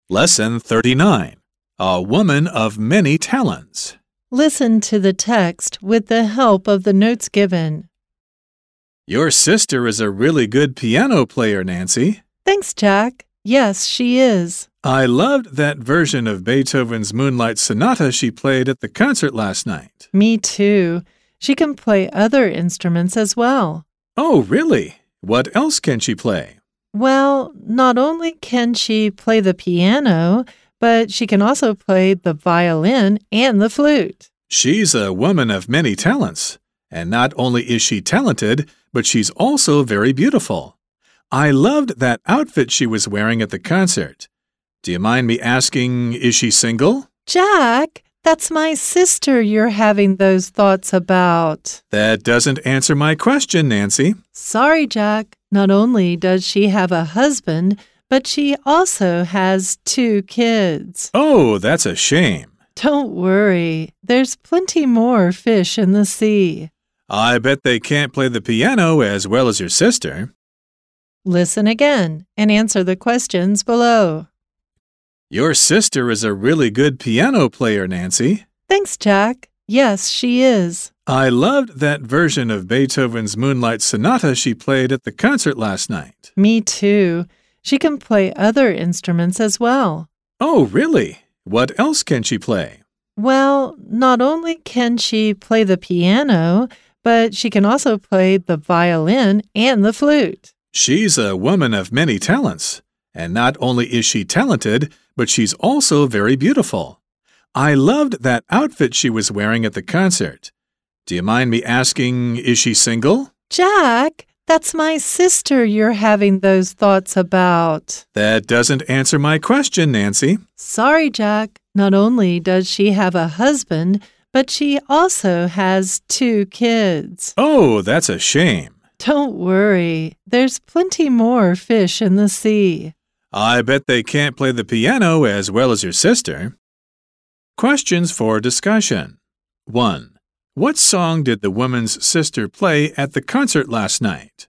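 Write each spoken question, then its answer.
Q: What song did the woman's sister play at the concert last night?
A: Beethoven's Moonlight Sonata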